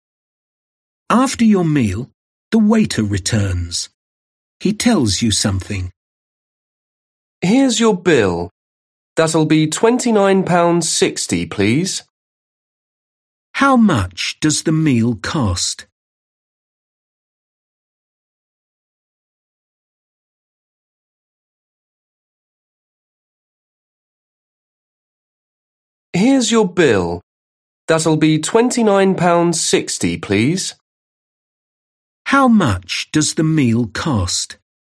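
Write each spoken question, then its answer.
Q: How much does the meal cost?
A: £29.60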